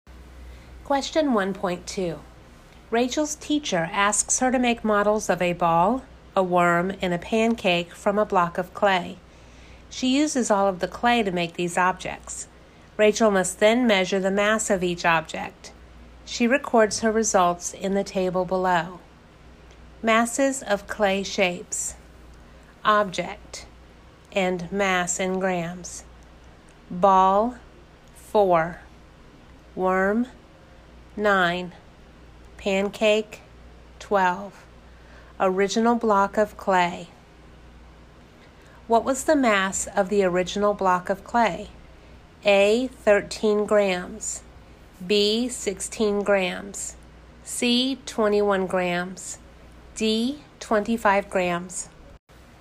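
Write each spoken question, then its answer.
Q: What was the mass of the original block of clay?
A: D: 25 grams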